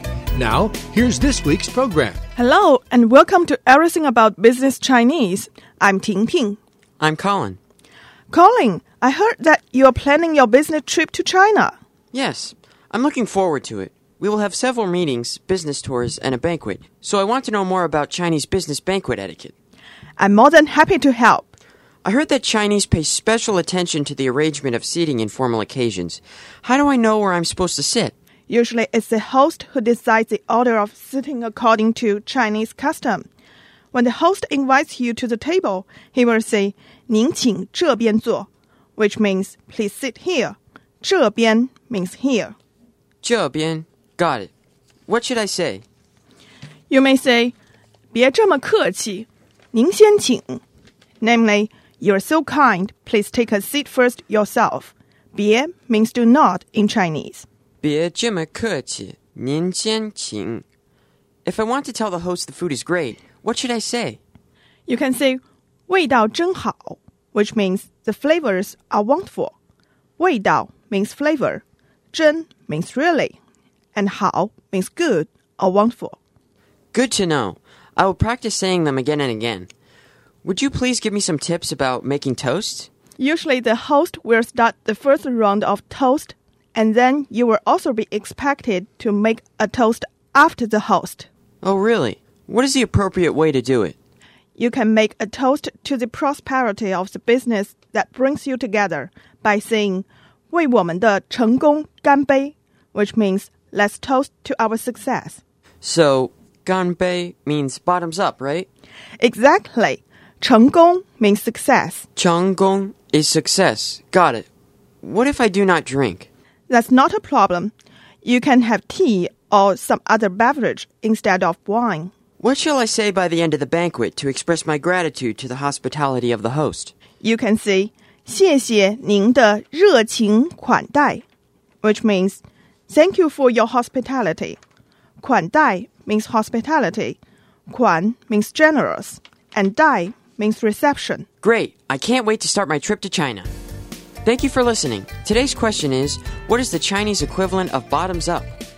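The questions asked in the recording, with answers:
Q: what is the Chinese equivalent of bottoms up?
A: 干杯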